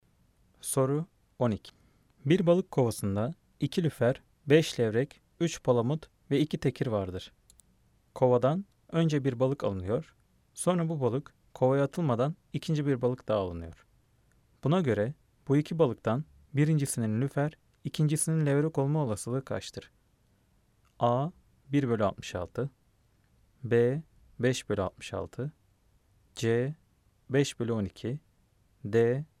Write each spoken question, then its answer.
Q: Buna göre bu iki balıktan birincisinin lüfer, ikincisinin levrek olma olasılığı kaçtır?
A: Cevap B. 5/66